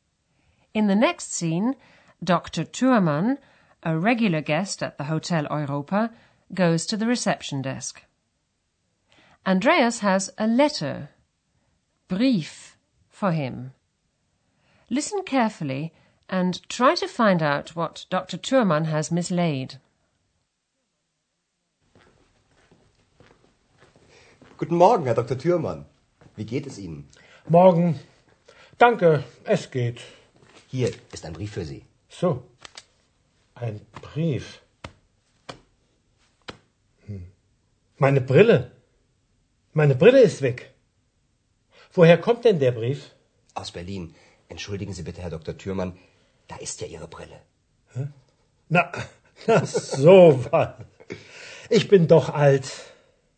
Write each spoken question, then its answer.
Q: Listen carefully and try to find out what Dr. Thurmann has mislaid.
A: He looks for them, but he can't find them.